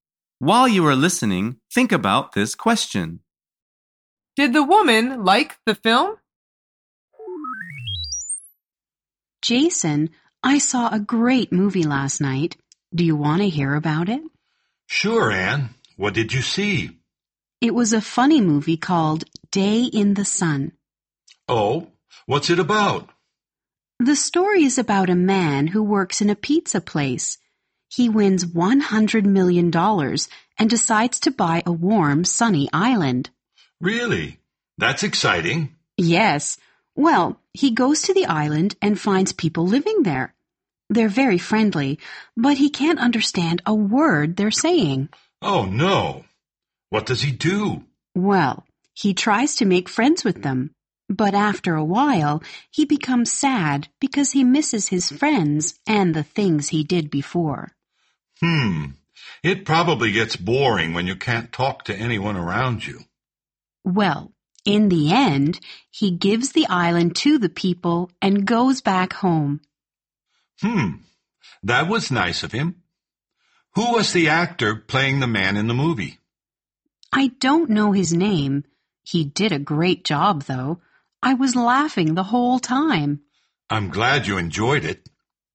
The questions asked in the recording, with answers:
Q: Did the woman like the film?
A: The answer is yes. She said it was great, and she laughed a lot.